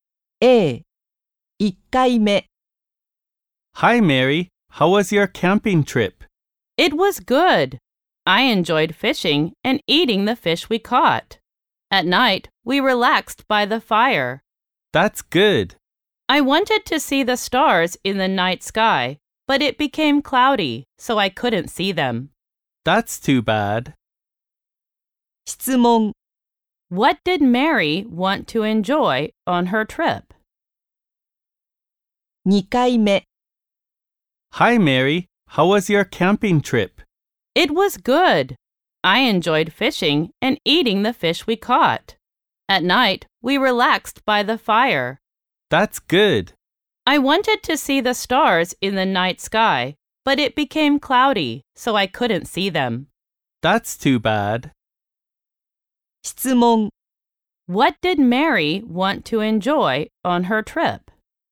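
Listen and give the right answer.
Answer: Seeing the stars in the night sky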